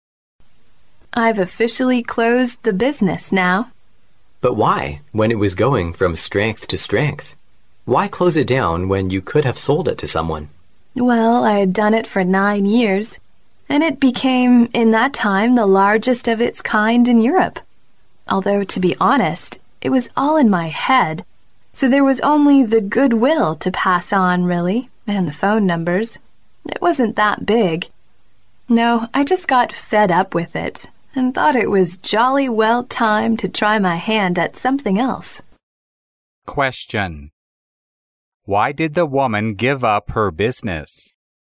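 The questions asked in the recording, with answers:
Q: Question. Why did the woman give up her business?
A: She got fed up with it and wanted to try something else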